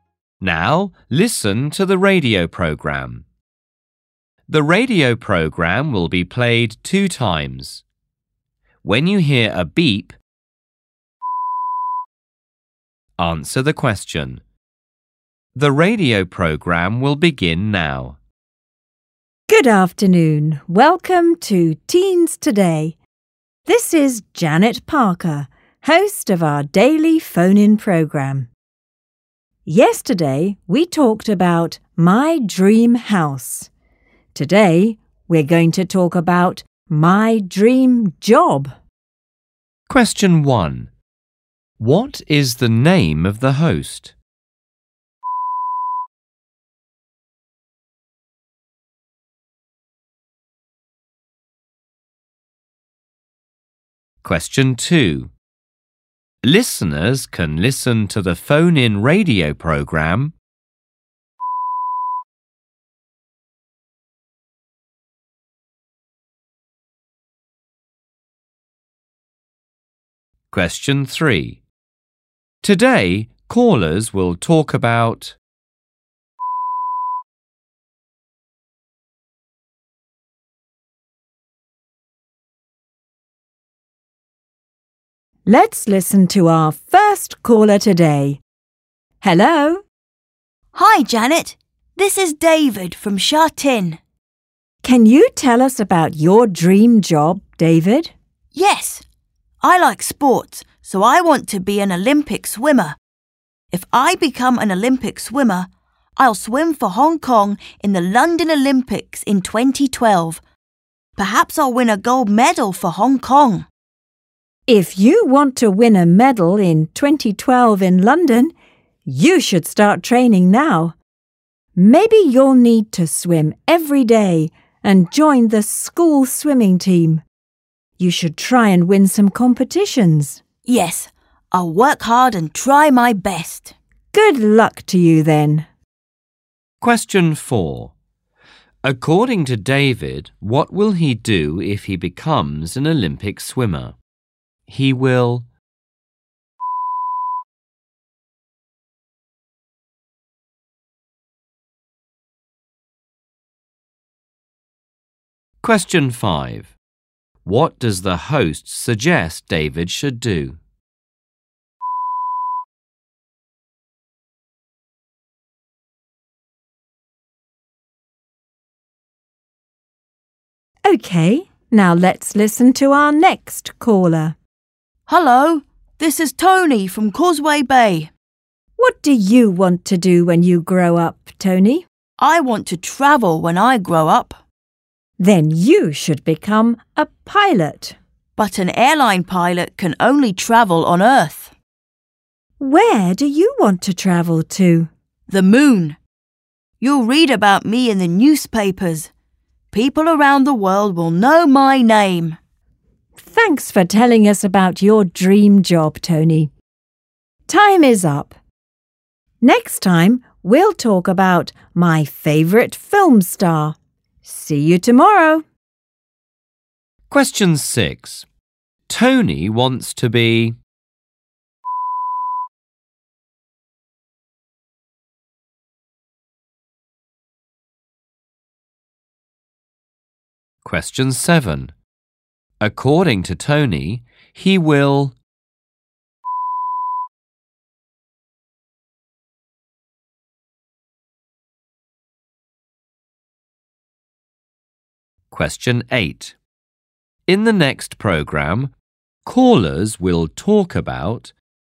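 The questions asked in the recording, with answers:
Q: What is the name of the host?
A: Janet Parker

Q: Today, callers will talk about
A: my dream job

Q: According to David, what will he do if he becomes an Olympic swimmer?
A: swim for Hong Kong in the London Olympics in 2012

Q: In the next programme, callers will talk about...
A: my favourite film star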